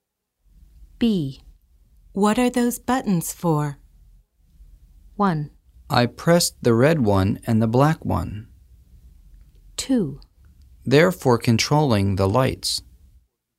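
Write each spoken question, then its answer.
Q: What are those buttons for?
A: 2: They're for controlling the lights.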